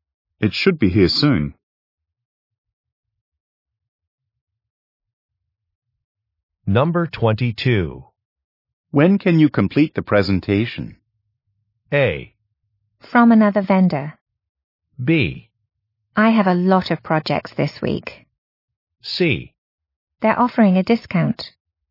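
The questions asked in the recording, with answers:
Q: When can you complete the presentation?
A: B: I have a lot of projects this week.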